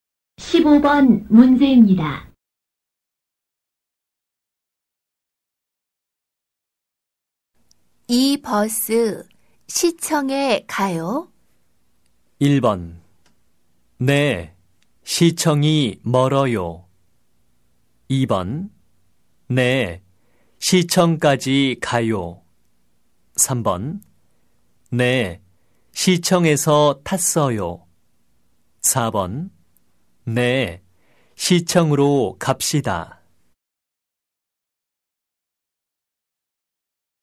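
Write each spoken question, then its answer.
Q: 이 버스 시청에 가요?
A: 2: 네, 시청까지 가요.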